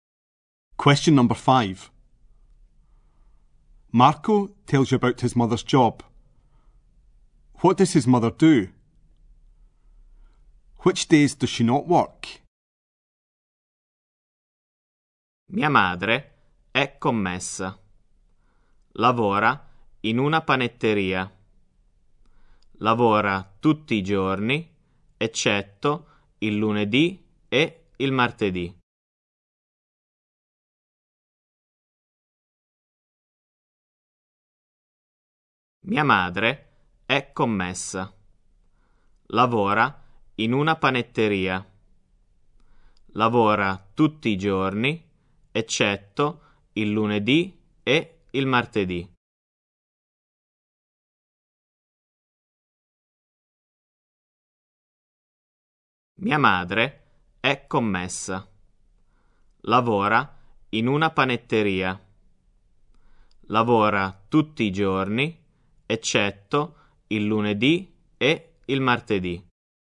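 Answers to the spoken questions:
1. She is a shop assistant in a bakery
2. Monday and Tuesday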